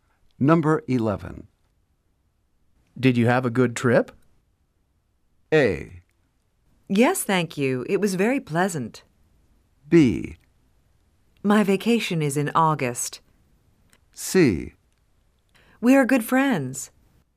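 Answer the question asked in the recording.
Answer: A: Yes, thank you. It was very pleasant.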